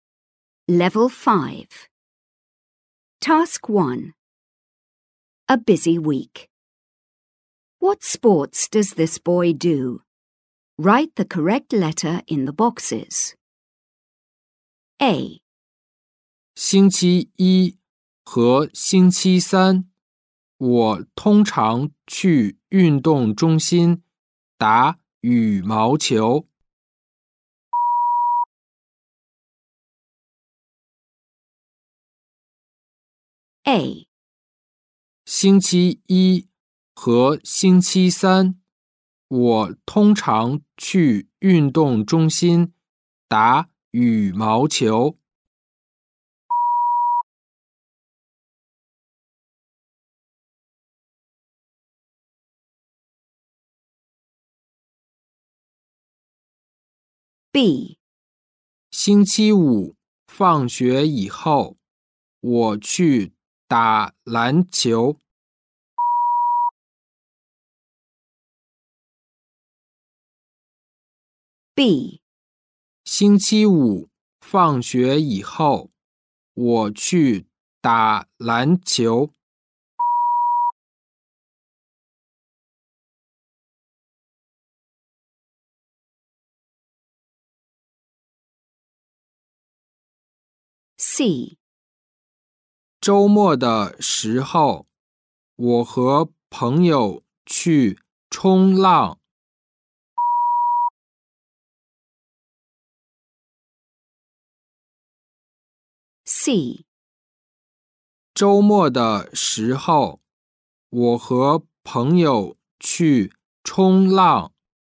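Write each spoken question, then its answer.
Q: What sports does this boy do?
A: Badminton (Mondays and Wednesdays at the sports centre)

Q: What sports does this boy do?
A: Basketball (Friday after school)

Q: What sports does this boy do?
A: Surfing (at weekends with friends)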